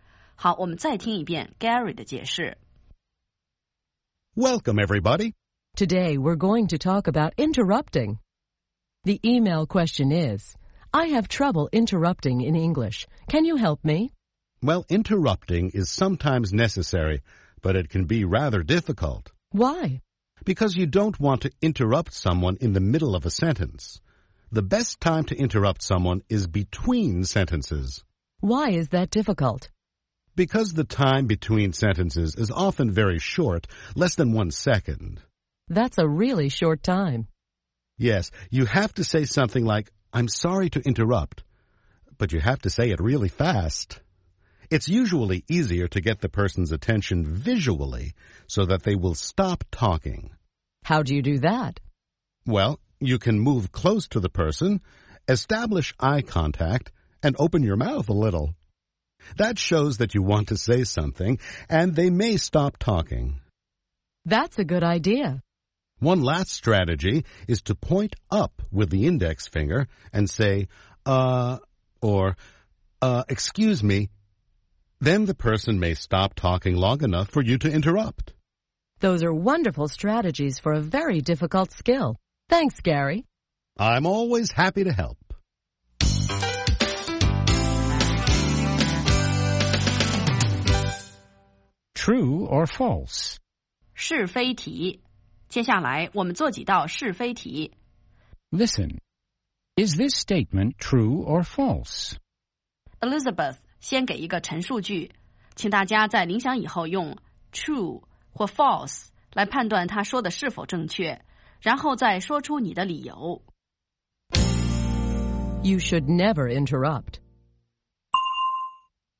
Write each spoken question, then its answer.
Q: You should never interrupt.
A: False. Interrupting is sometimes necessary.